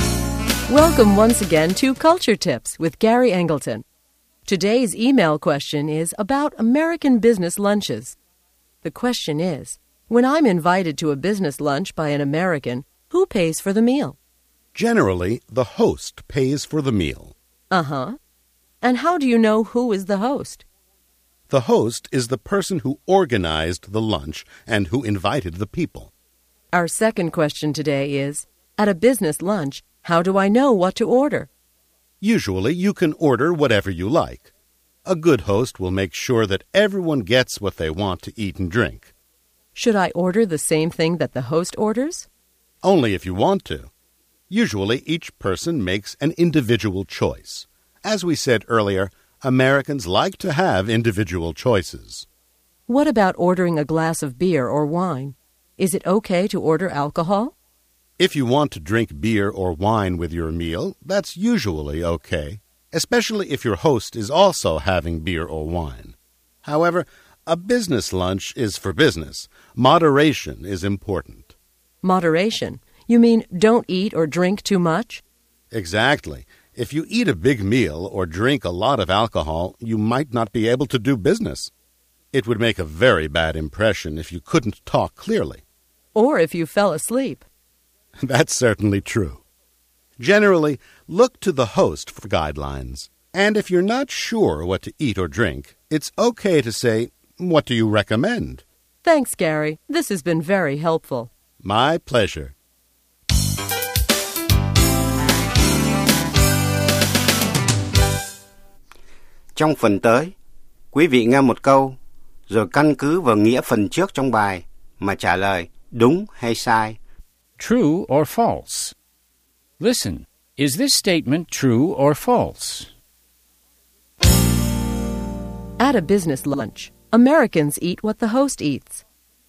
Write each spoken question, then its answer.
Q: At a business lunch, Americans eat what the host eats.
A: False. Americans eat whatever they want to eat.